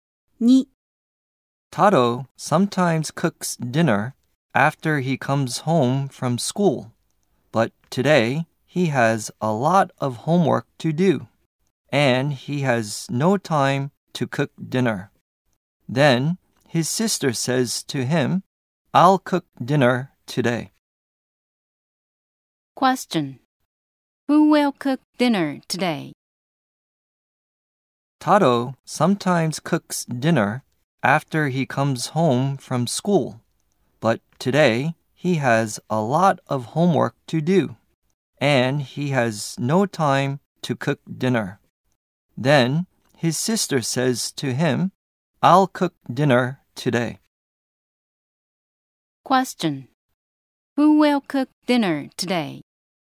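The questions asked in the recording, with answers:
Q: Question: Who will cook dinner today?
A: Taro's sister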